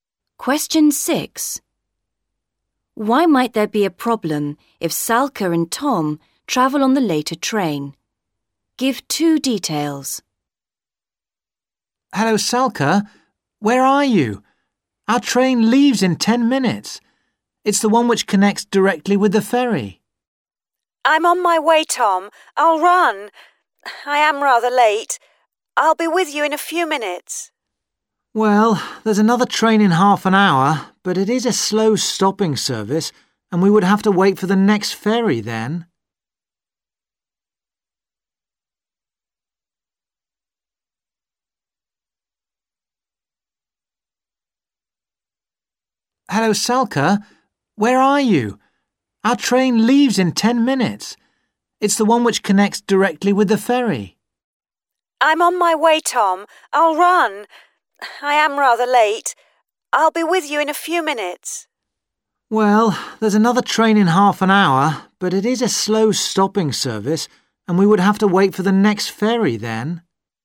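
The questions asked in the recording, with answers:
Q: Why might there be a problem if Salka and Tom travel on the later train?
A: It is a slow stopping train, and they would have to wait for the next ferry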